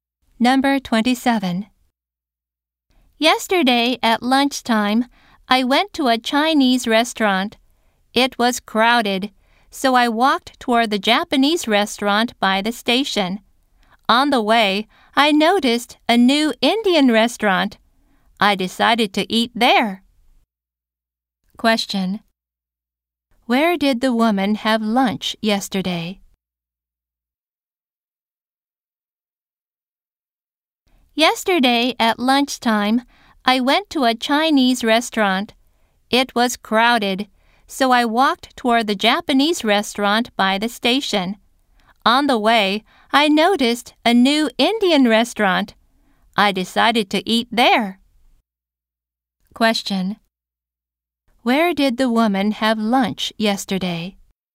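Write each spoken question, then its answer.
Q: Where did the woman have lunch yesterday?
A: At a new Indian restaurant.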